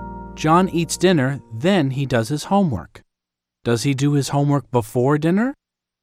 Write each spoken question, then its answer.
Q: Does he do his homework before dinner?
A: No, he doesn't. He does his homework after dinner.